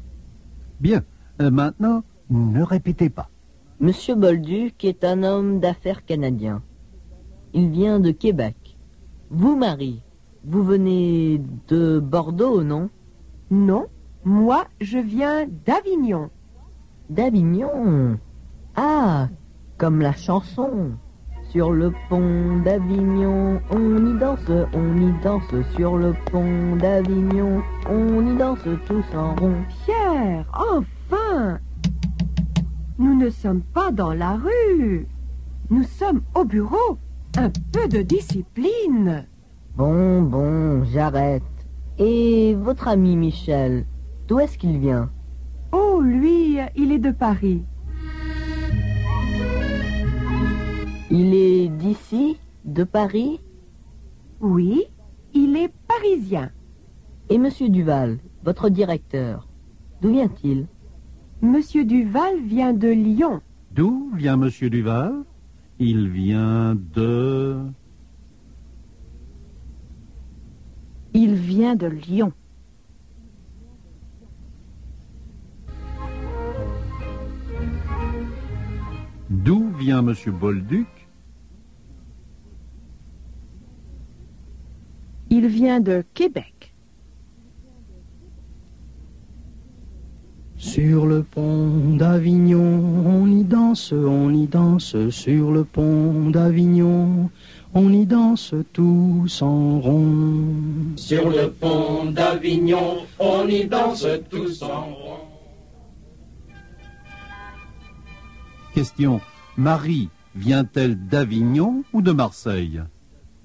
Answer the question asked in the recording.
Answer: Elle vient d'Avignon.